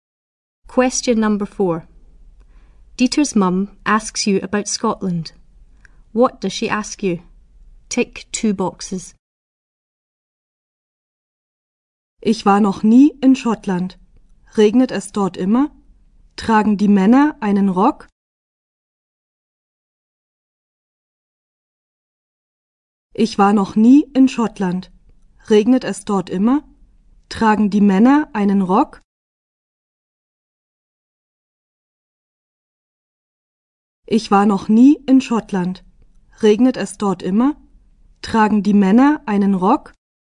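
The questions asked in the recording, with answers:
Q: What does she ask you?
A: Does it always rain there? Do the men wear a skirt (kilt)?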